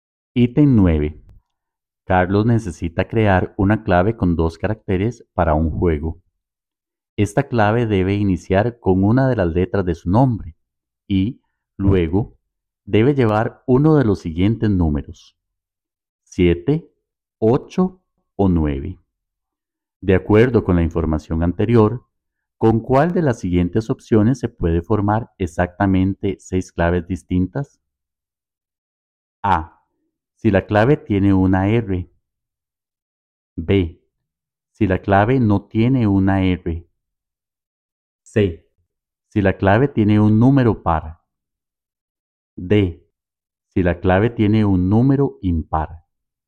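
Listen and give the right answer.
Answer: C: Si la clave tiene un número par.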